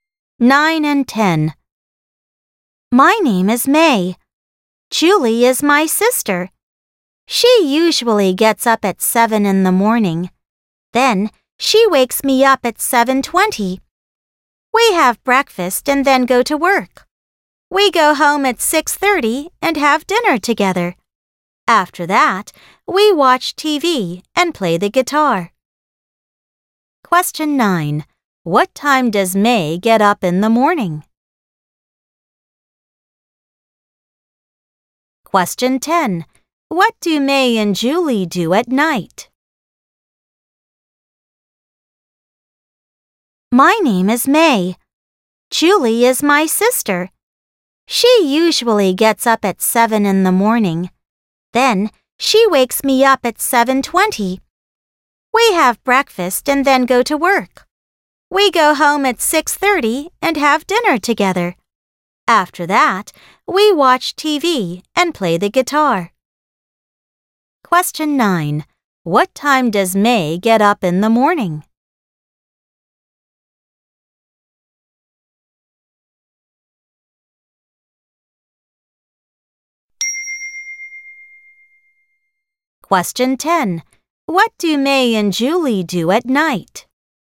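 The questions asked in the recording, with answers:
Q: What time does May get up in the morning?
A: At 7:20

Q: What do May and Julie do at night?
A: They watch TV and play the guitar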